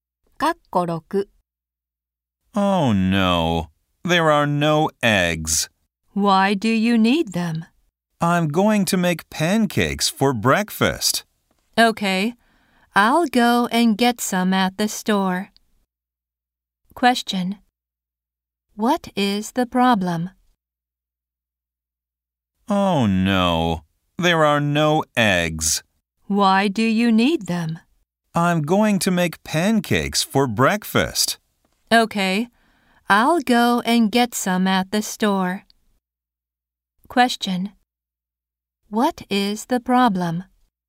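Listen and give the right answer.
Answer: There are no eggs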